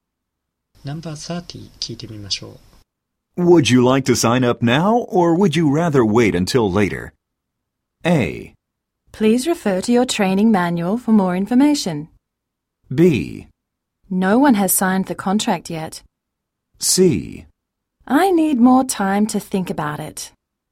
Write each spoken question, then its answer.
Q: Would you like to sign up now, or would you rather wait until later?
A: 意味が噛み合う応答は、I need more time to think about it.